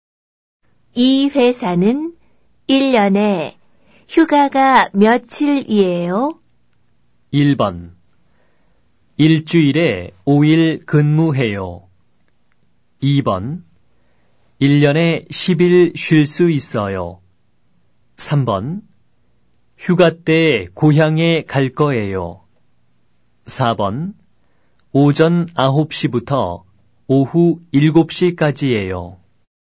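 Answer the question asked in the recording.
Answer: 2: 1년에 10일 쉴 수 있어요.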